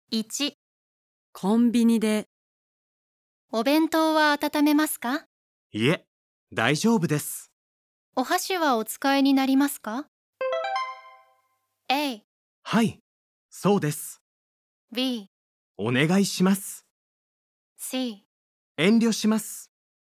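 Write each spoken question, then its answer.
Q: お箸はお使いになりますか?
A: B: お願いします。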